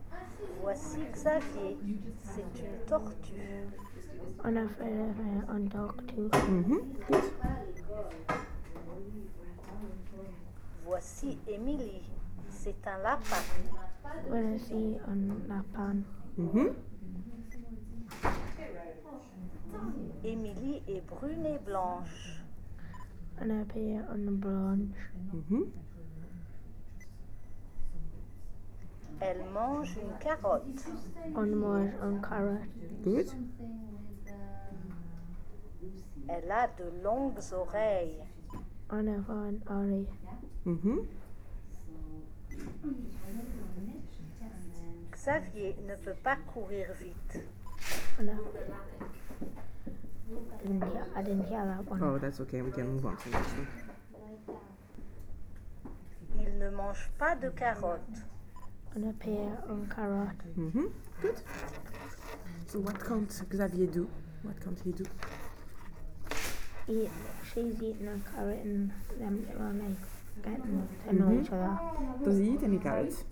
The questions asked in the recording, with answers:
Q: Does he eat any carrots?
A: No.